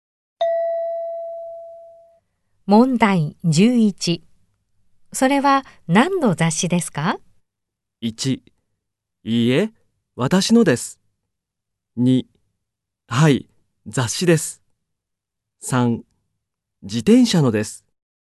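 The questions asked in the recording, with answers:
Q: それは何の雑誌ですか?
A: 1: 自転車のです。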